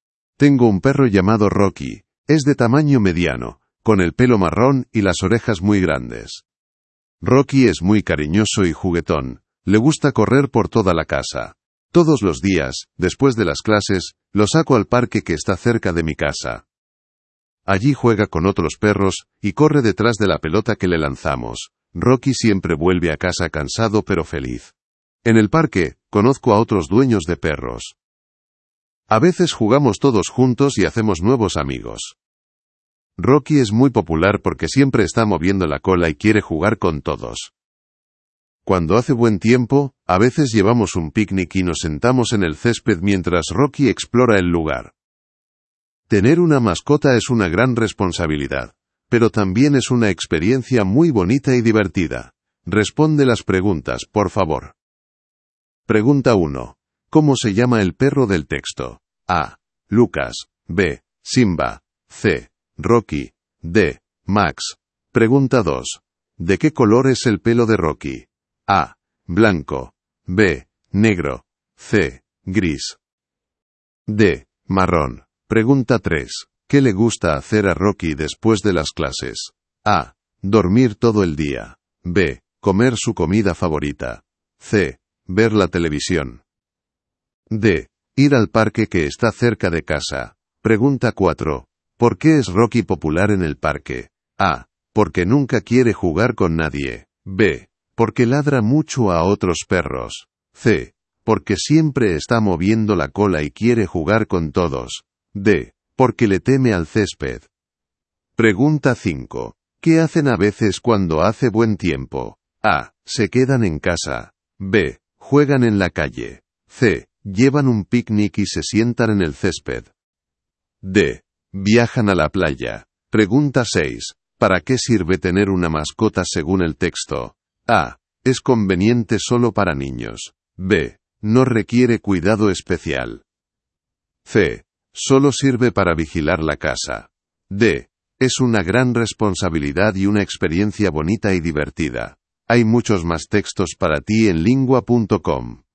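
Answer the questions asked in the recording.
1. C: Rocky
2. D: Marrón
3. D: Ir al parque que está cerca de casa
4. C: Porque siempre está moviendo la cola y quiere jugar con todos
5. C: Llevan un picnic y se sientan en el césped
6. D: Es una gran responsabilidad y una experiencia bonita y divertida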